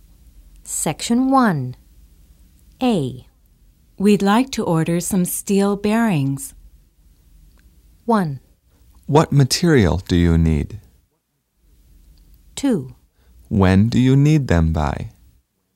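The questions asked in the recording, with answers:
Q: We'd like to order some steel bearings.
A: 2: When do you need them by?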